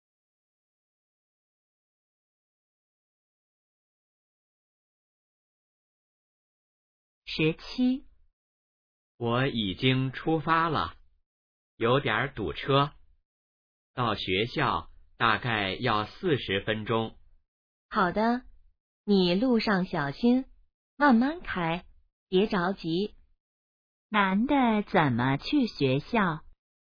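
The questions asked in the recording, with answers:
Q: 男的怎么去学校?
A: 开车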